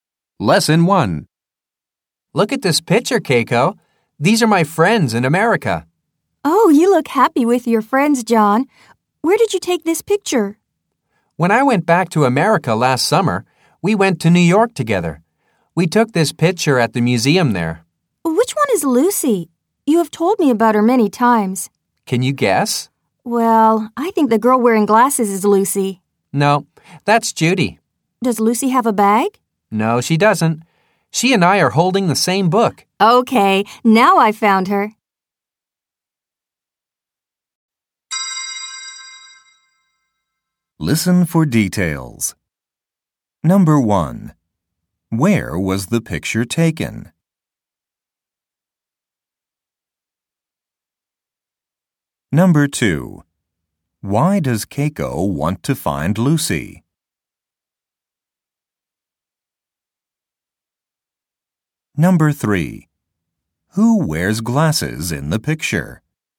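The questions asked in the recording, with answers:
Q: Where was the picture taken?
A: At the museum in New York

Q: Why does Keiko want to find Lucy?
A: Because John has told her about Lucy many times

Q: Who wears glasses in the picture?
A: Judy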